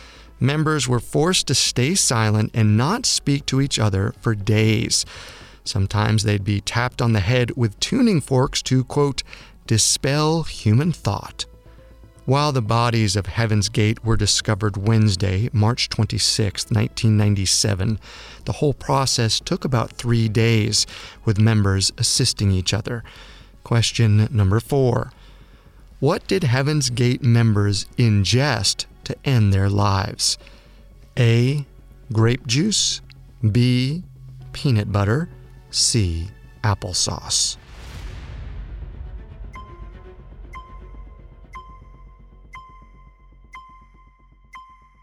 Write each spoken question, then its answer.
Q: What did Heaven's Gate members ingest to end their lives?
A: The correct answer is C.